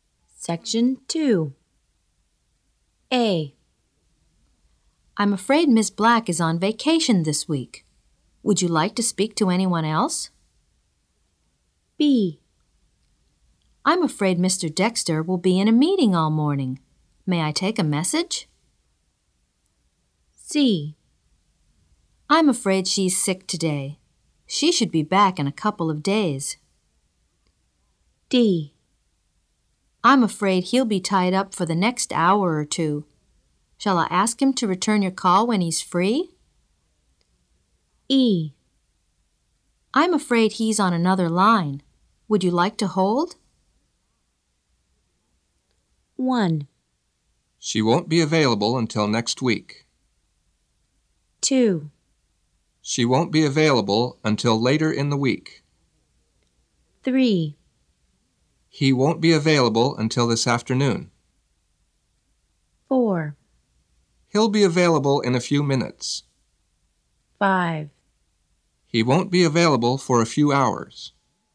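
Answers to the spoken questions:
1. A: I'm afraid Miss Black is on vacation this week.
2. C: I'm afraid she's sick today.
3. B: I'm afraid Mr. Dexter will be in a meeting all morning.
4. E: I'm afraid he's on another line.
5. D: I'm afraid he'll be tied up for the next hour or two.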